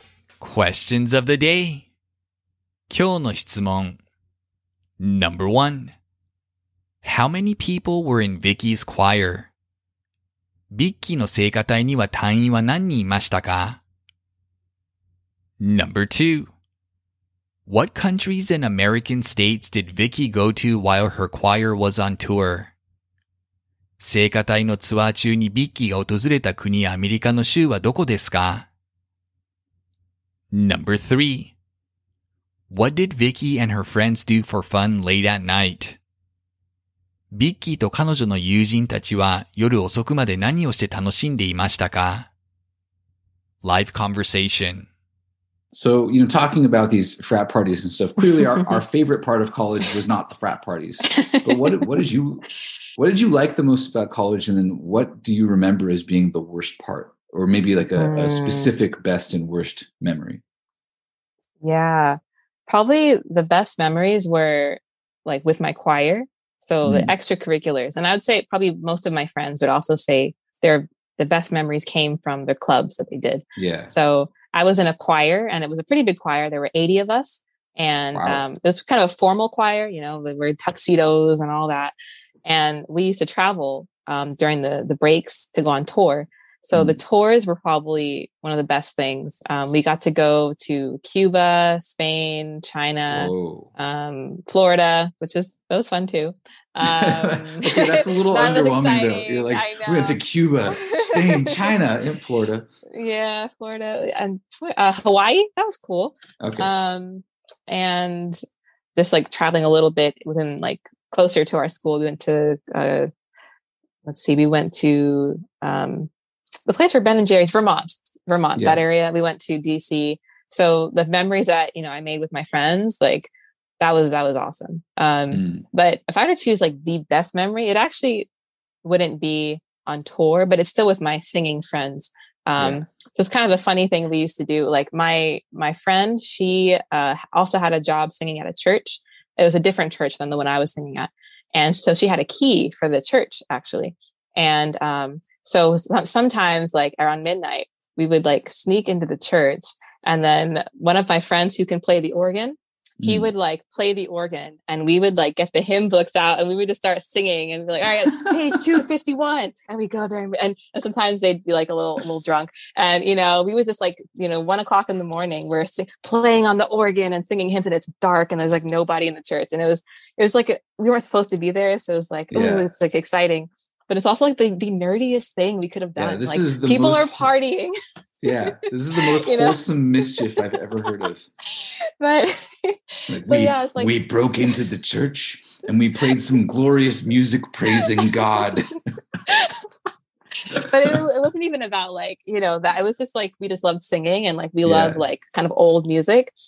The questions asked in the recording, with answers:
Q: How many people were in Vicky's choir?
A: She said there were 80 people in her choir.

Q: What countries and American states did Vicky go to while her choir was on tour?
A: She went to Cuba, Spain, and China. In America, she visited Florida, Hawaii, Washington, D.C., and Vermont.

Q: What did Vicky and her friends do for fun late at night?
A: Sometimes late at night, they would use her friend's keys to a church to sneak in and gather together to sing hymns.